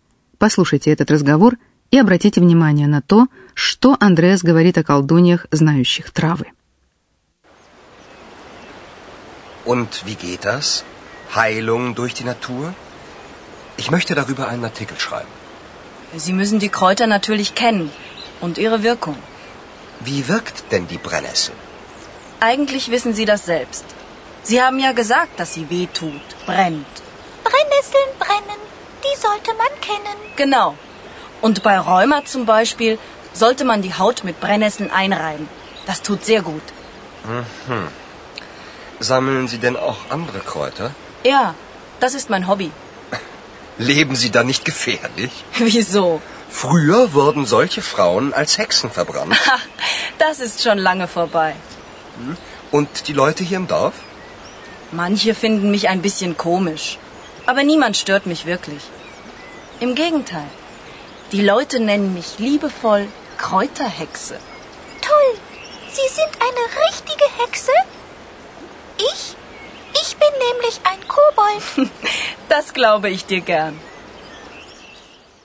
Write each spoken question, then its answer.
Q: Послушайте этот разговор и обратите внимание на то, что Андреас говорит о колдуньях, знающих травы.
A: Андреас в шутку напоминает, что раньше женщин, лечивших людей травами, сжигали на кострах как ведьм, потому что считалось, что они связаны с потусторонними силами.